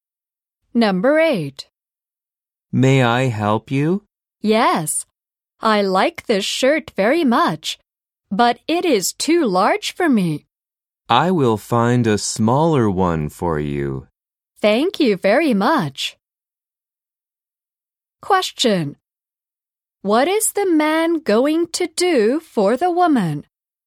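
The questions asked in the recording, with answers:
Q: What is the man going to do for the woman?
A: Find a smaller shirt for her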